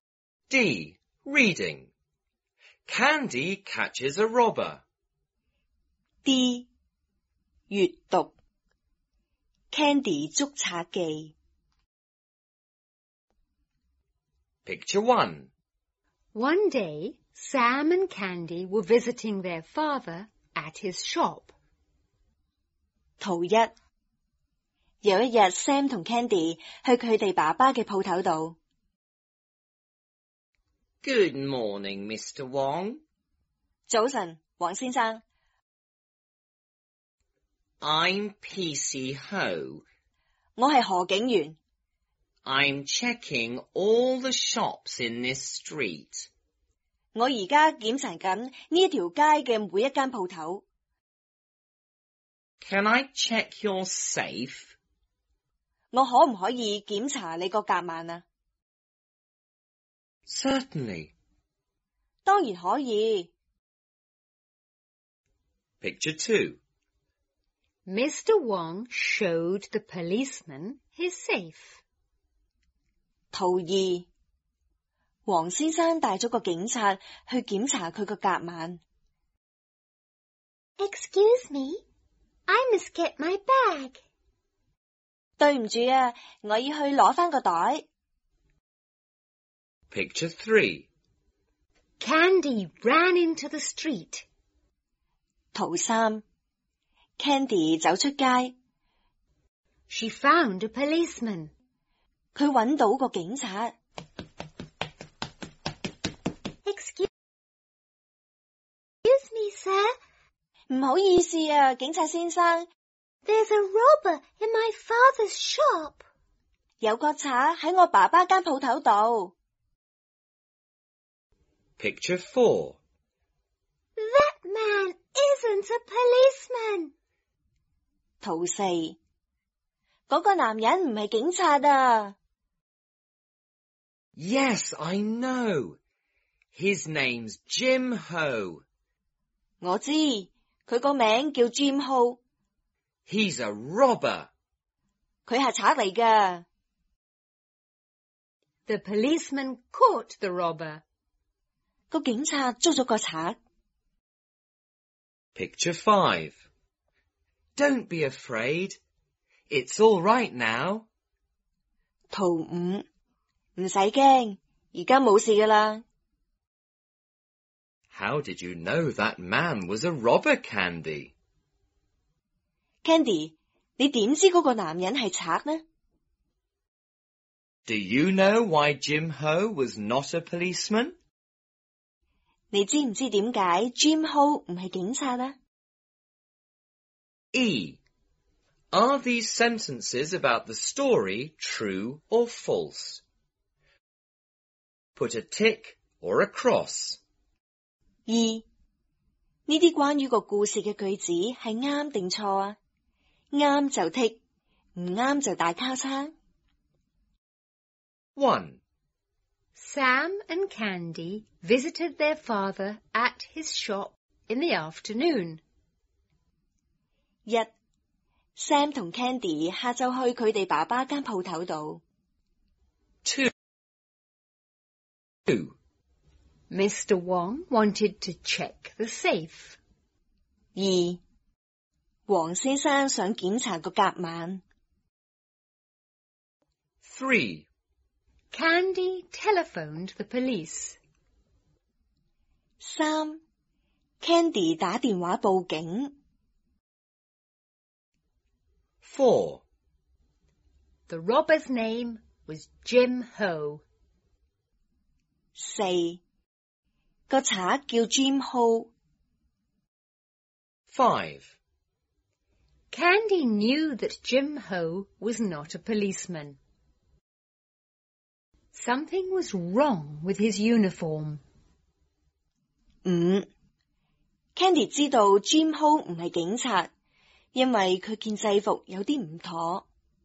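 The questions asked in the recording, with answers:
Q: Sam and Candy visited their father at his shop in the afternoon.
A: False (it was morning)

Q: Mr. Wong wanted to check the safe.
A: False (PC Ho wanted to check it)

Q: Candy telephoned the police.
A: False (she found a policeman in the street)

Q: The robber's name was Jim Ho.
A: True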